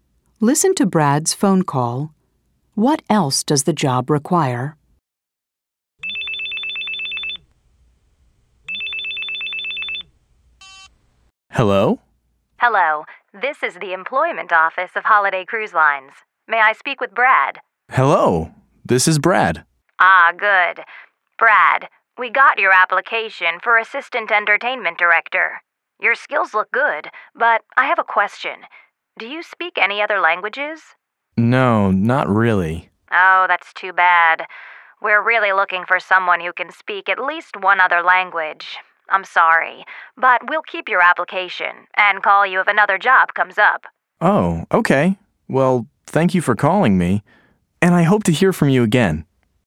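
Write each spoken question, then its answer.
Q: What else does the job require?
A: Speaking at least one other language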